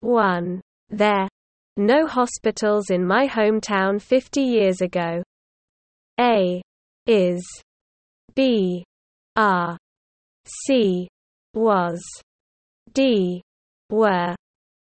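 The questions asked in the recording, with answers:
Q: There. No hospitals in my hometown 50 years ago.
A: D: Were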